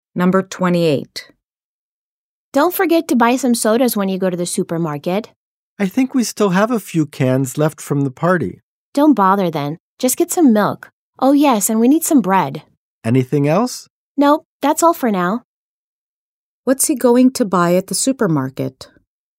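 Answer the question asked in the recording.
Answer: Milk and bread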